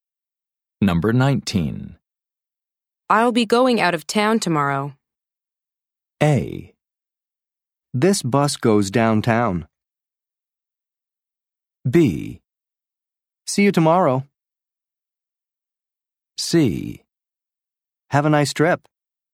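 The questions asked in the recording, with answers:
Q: I'll be going out of town tomorrow.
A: C: Have a nice trip.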